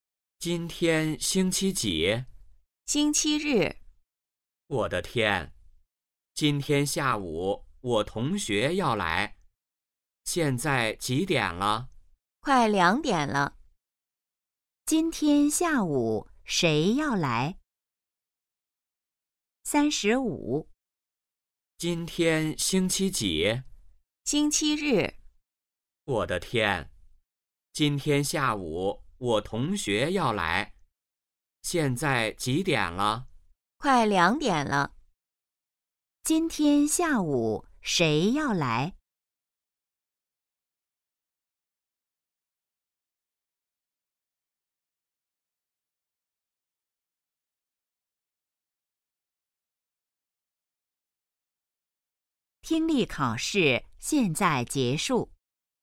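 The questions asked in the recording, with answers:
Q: 今天下午谁要来?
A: 同学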